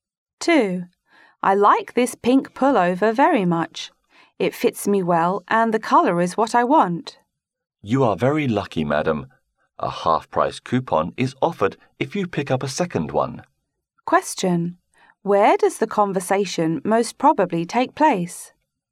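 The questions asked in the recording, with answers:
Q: Where does the conversation most probably take place?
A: In a clothing store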